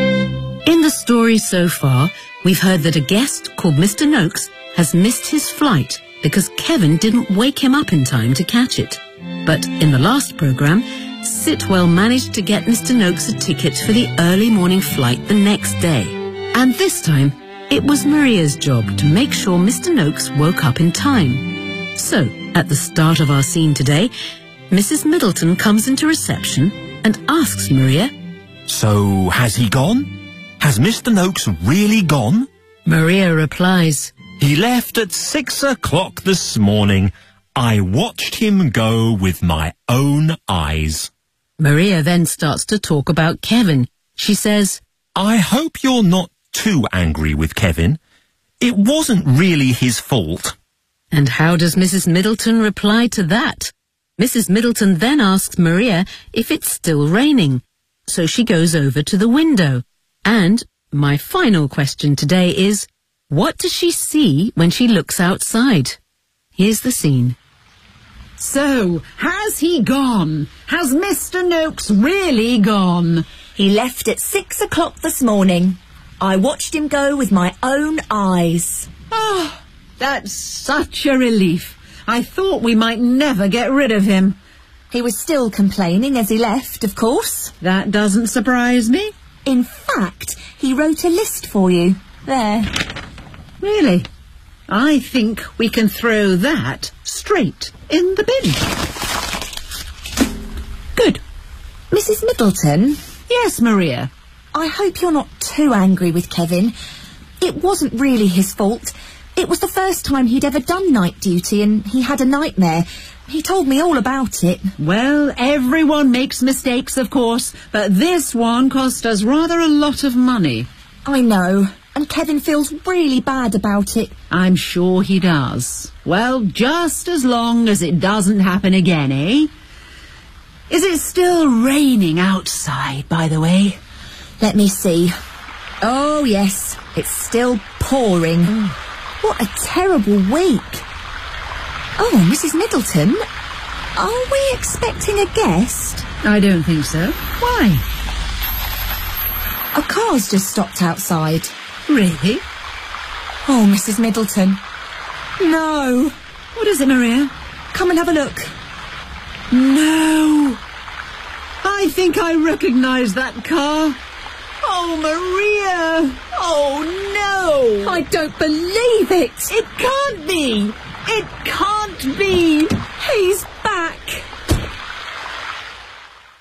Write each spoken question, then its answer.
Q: And how does Mrs. Middleton reply to that?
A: Well, everyone makes mistakes, of course, but this one cost us rather a lot of money.

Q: And my final question today is, what does she see when she looks outside?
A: he's back!